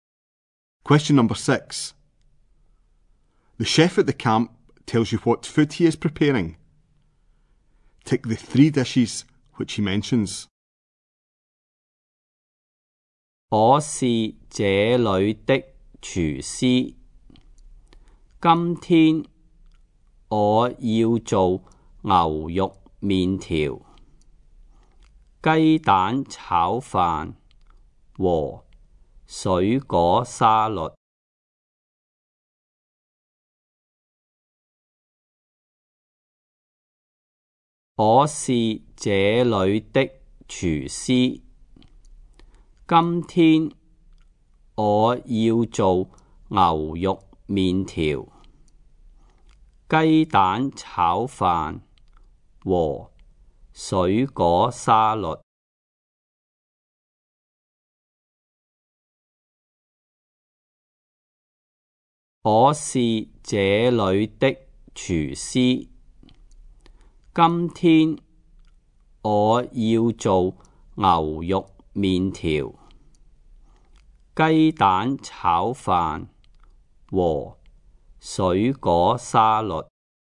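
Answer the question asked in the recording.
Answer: Beef noodles, egg fried rice, fruit salad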